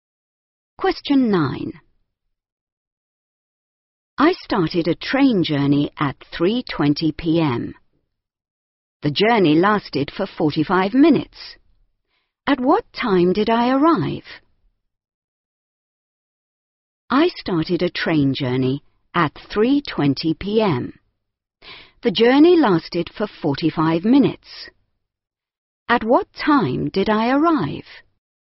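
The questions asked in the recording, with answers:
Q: At what time did I arrive?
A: 4:05 p.m.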